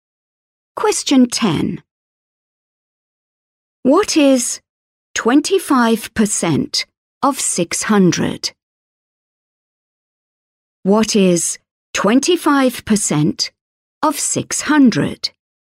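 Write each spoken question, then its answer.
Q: What is 25% of 600?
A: 150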